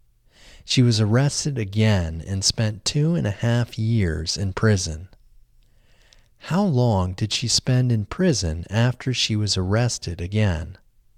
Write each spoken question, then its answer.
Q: How long did she spend in prison after she was arrested again?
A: She spent 2.5 years in prison after she was arrested again.